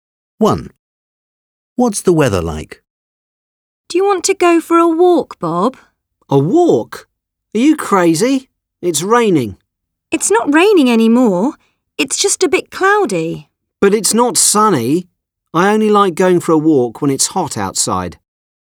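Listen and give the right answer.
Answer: Cloudy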